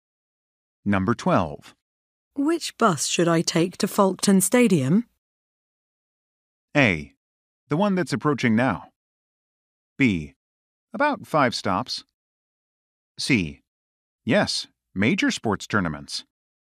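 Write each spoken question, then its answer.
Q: Which bus should I take to Folkestone Stadium?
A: A: The one that's approaching now.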